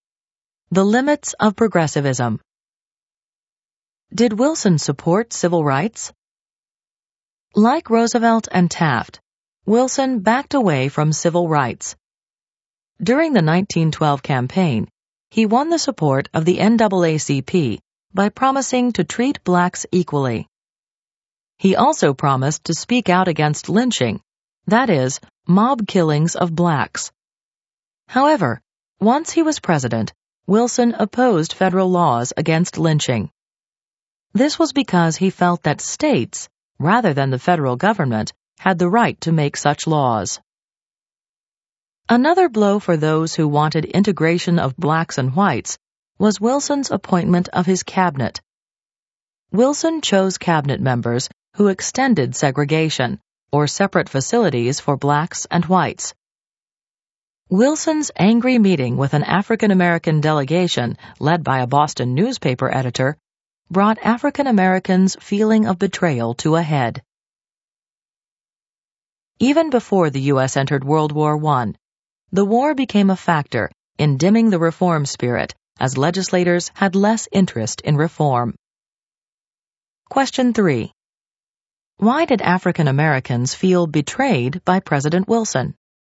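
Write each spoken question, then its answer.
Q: Why did African-Americans feel betrayed by President Wilson?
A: He broke his promises: he opposed federal anti-lynching laws and appointed cabinet members who extended segregation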